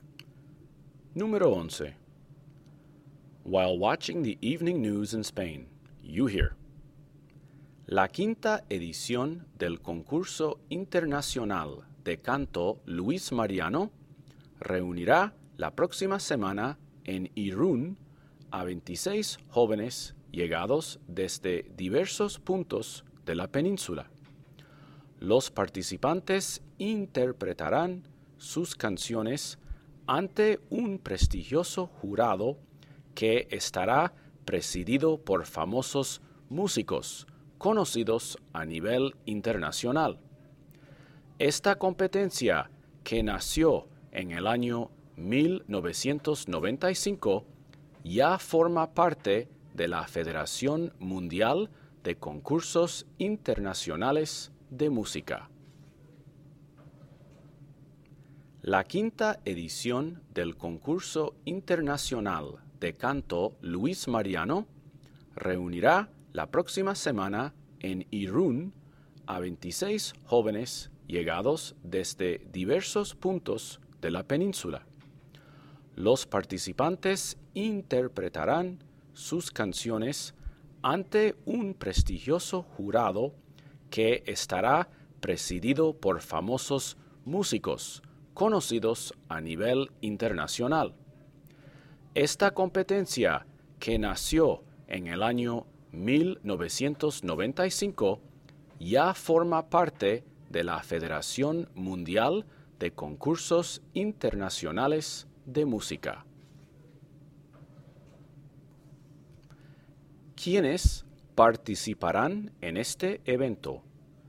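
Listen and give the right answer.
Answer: 26 jóvenes cantantes de diversos puntos de la península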